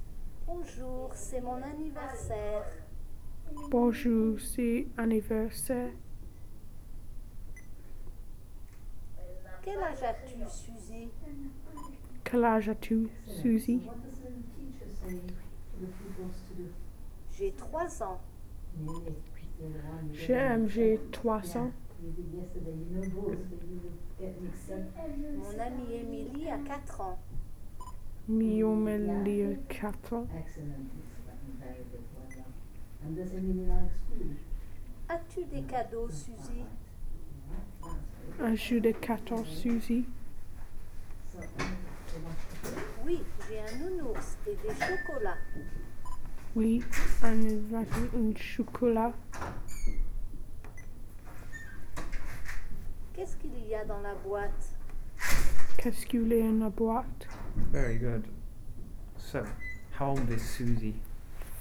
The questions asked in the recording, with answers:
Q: So, how old is Suzy?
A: 3? Okay.